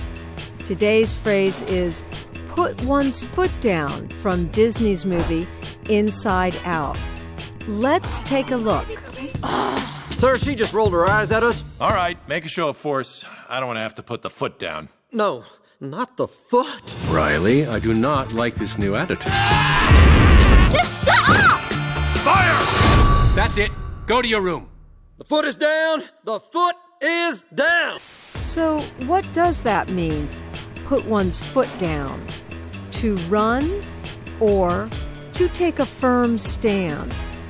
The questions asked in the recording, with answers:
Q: So what does that mean, put one's foot down?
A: To put one's foot down means to take a firm stand.